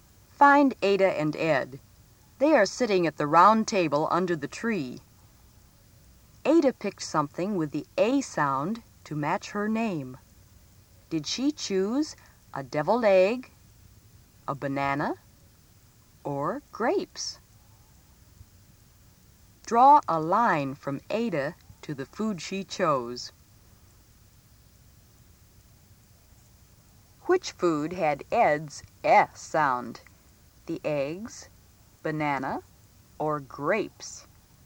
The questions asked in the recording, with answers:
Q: Did she choose a deviled egg, a banana, or grapes?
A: You should have drawn your lines to show that Ada chose grapes

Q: Which food had Ed's E sound?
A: Ed took the eggs